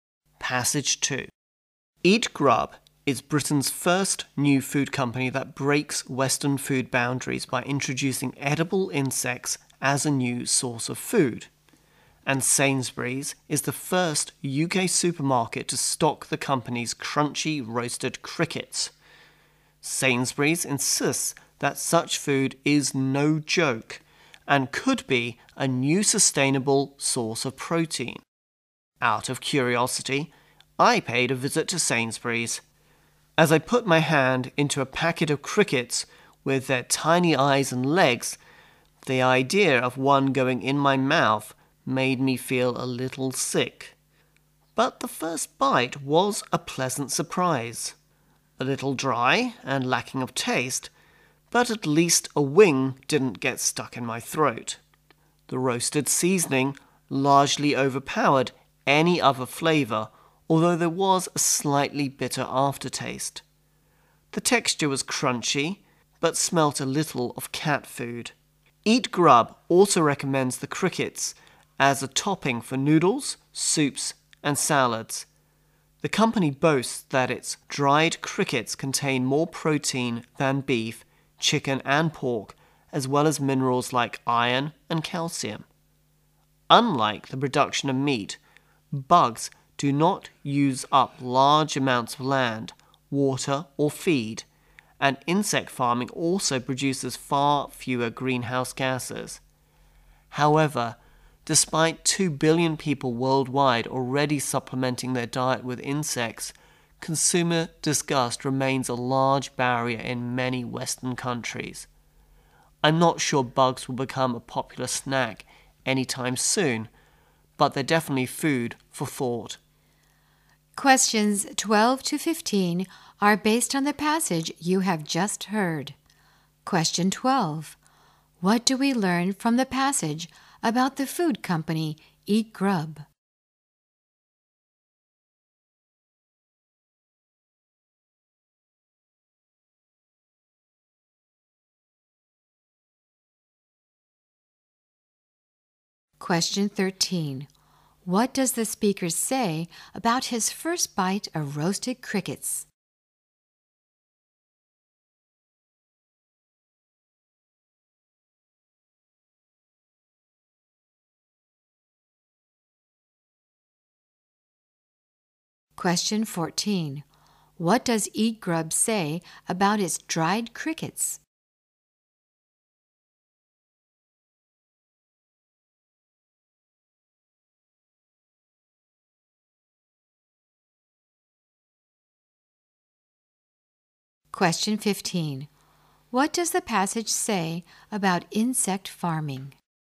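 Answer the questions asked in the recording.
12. It is Britain's first company to introduce edible insects as food.
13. It was a pleasant surprise.
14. They contain more protein than beef, chicken and pork.
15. It produces far fewer greenhouse gases and uses less land, water and feed.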